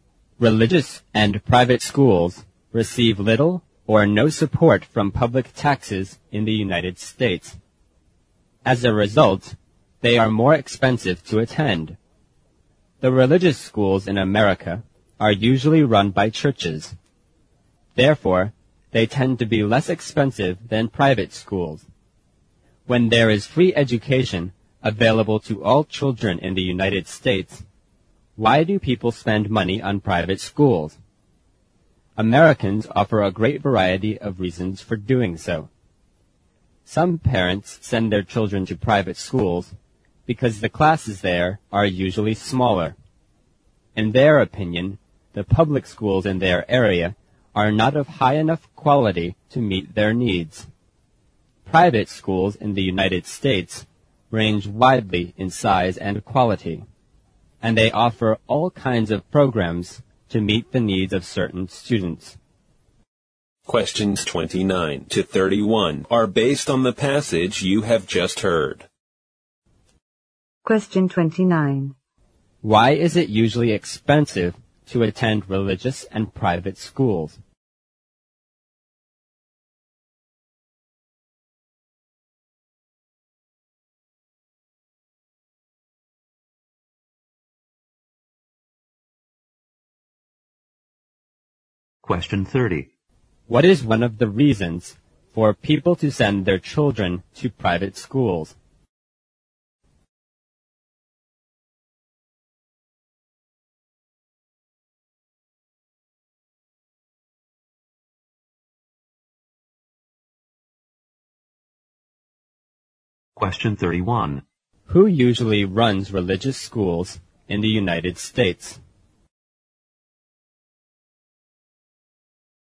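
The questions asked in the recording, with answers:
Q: Why is it usually expensive to attend religious and private schools?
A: They receive little or no support from public taxes.

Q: What is one of the reasons for people to send their children to private schools?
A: The classes there are usually smaller.

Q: Who usually runs religious schools in the United States?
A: Churches.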